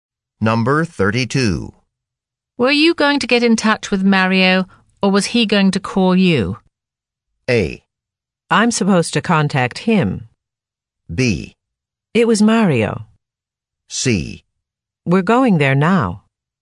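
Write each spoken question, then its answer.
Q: Were you going to get in touch with Mario, or was he going to call you?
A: A: I'm supposed to contact him.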